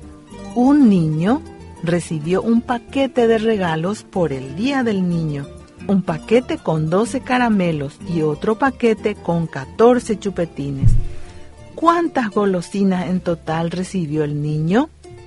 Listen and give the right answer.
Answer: En total habían 26 golosinas en el paquete.